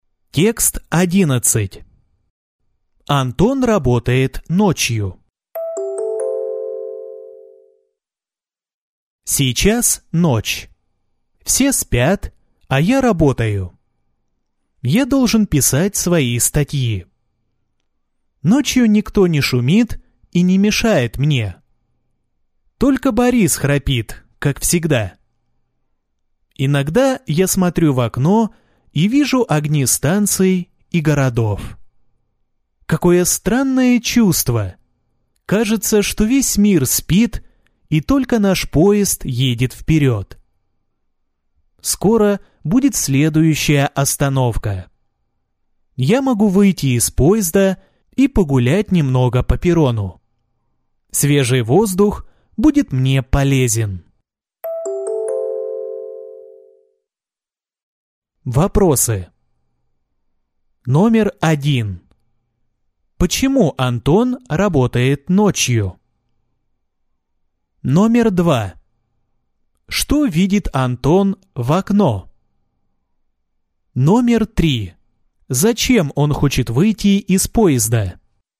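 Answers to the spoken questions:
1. Ночью никто не шумит и не мешает ему.
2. Огни станций и городов.
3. Чтобы погулять по перрону и подышать свежим воздухом.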